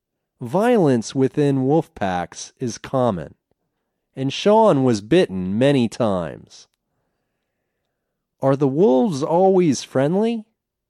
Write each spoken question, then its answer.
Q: Are the wolves always friendly?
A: No, the wolves aren't always friendly.